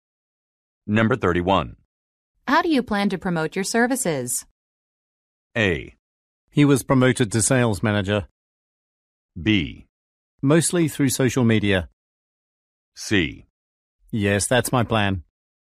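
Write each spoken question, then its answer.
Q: How do you plan to promote your services?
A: B: Mostly through social media.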